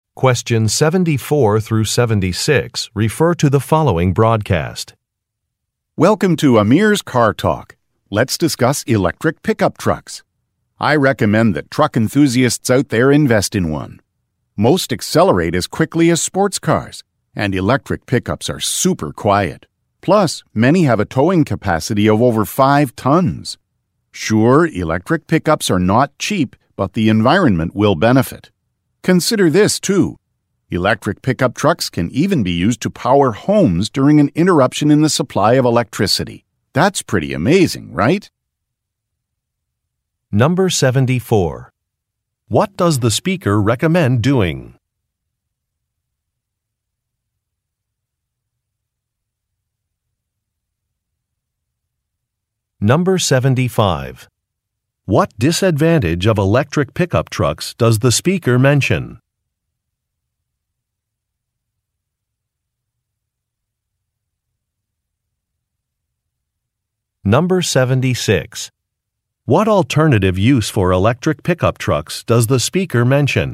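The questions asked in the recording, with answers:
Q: What does the speaker recommend doing?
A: Buying an electric pickup truck

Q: What disadvantage of electric pickup trucks does the speaker mention?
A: They are expensive

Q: What alternative use for electric pickup trucks does the speaker mention?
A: Powering homes during a power outage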